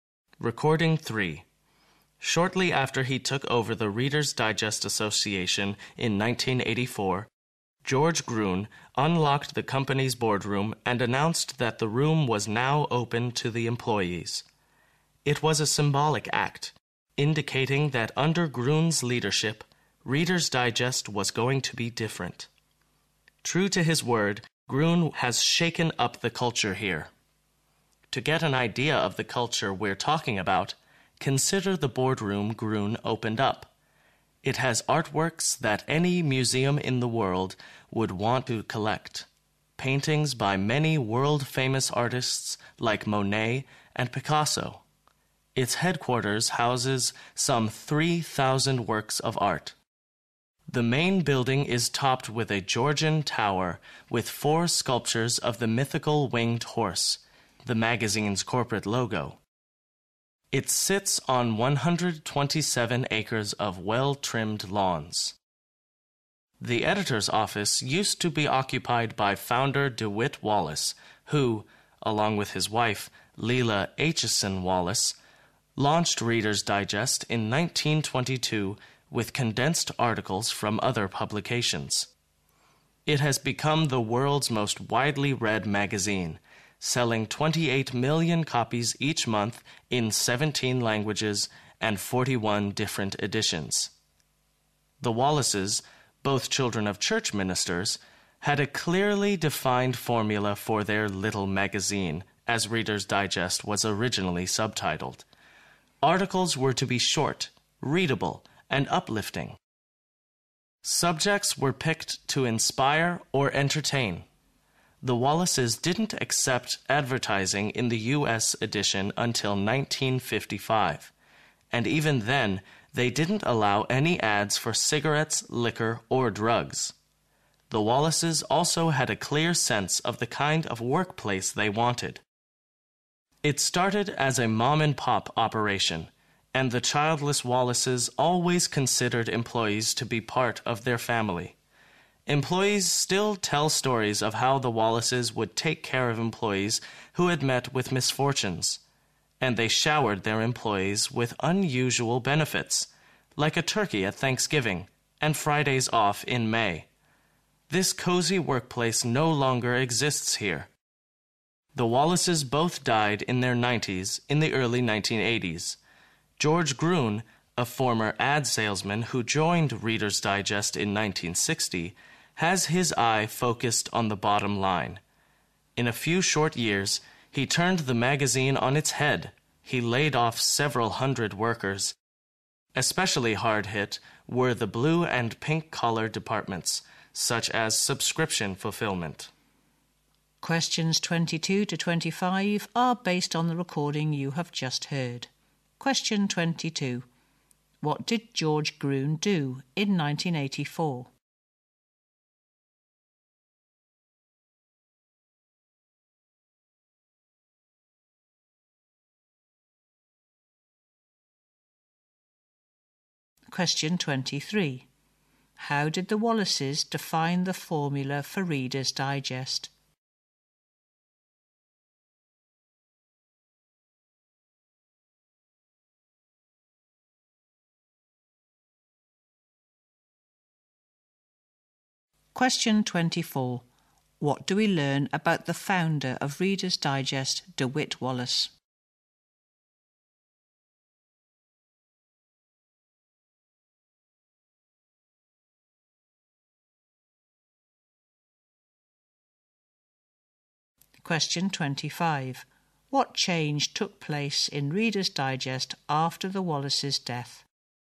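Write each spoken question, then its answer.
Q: What did George Gruen do in 1984?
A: He opened the company's boardroom to employees

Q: How did the Wallaces define the formula for Reader's Digest?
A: Articles were to be short, readable and uplifting

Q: What change took place in Reader's Digest after the Wallaces' death?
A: Several hundred workers were laid off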